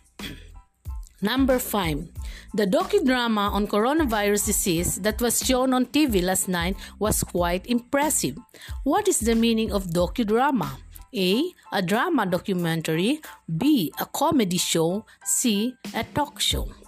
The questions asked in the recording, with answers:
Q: What is the meaning of docudrama?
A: Yes, letter A, a drama documentary.